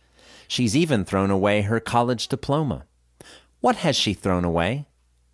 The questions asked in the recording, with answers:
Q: What has she thrown away?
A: She's thrown away her college diploma.